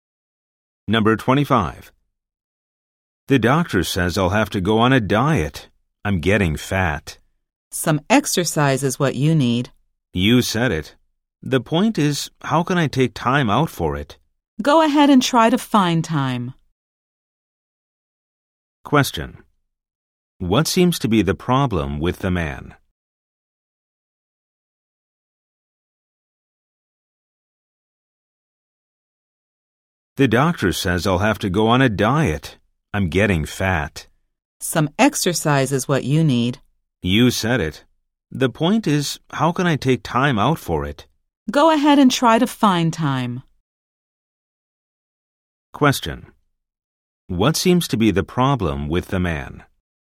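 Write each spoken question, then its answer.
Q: What seems to be the problem with the man?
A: He is getting fat and has no time to exercise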